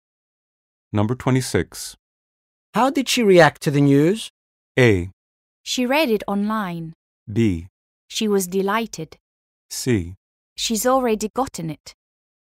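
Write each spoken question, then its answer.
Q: How did she react to the news?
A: B: She was delighted.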